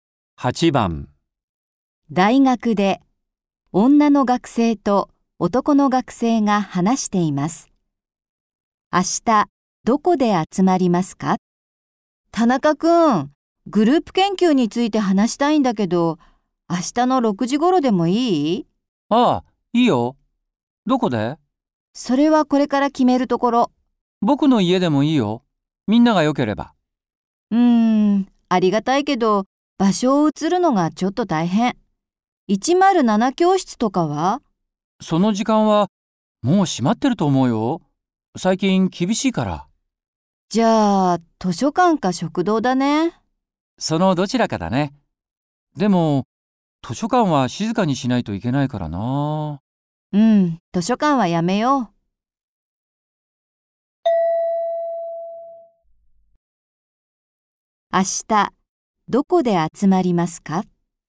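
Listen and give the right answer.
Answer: 食堂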